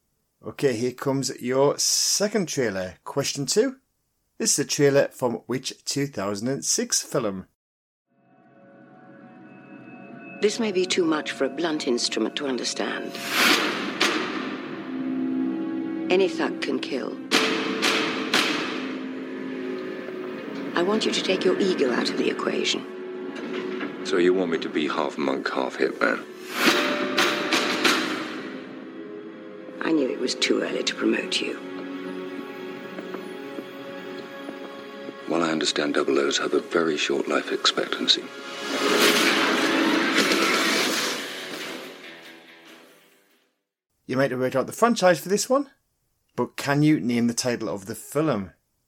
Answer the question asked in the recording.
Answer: It was from 2006 and it was Casino Royale.